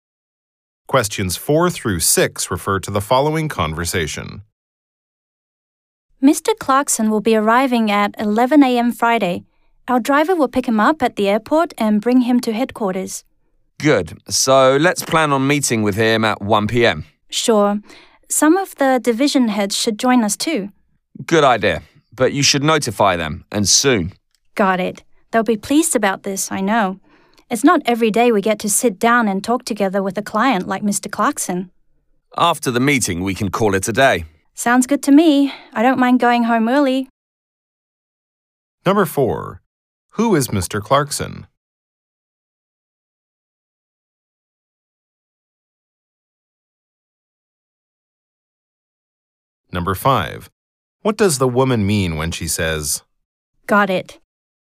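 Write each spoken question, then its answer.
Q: Who is Mr. Clarkson?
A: A client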